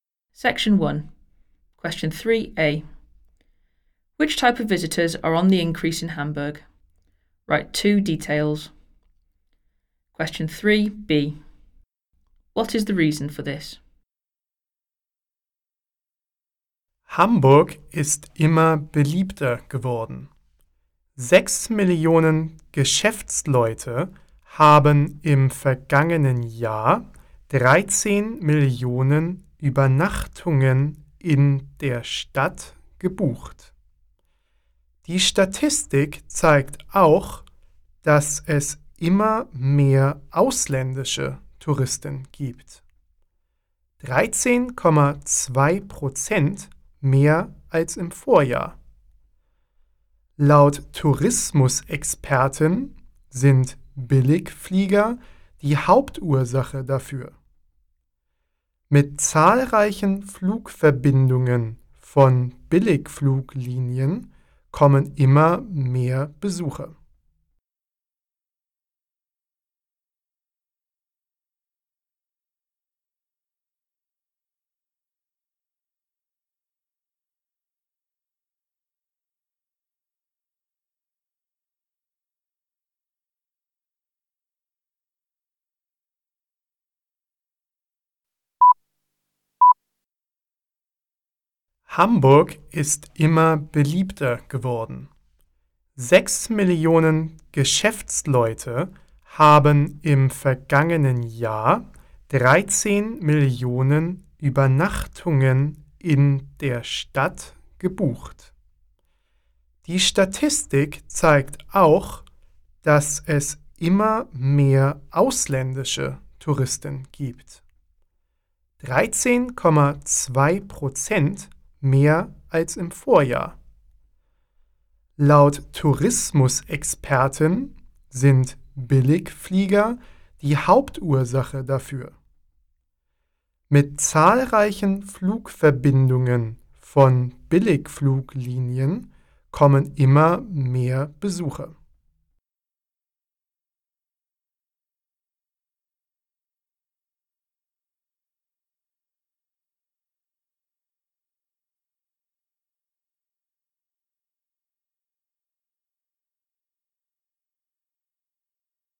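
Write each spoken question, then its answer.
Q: Which type of visitors are on the increase in Hamburg?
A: Business people and foreign tourists

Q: What is the reason for this?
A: Budget airlines / many low-cost flight connections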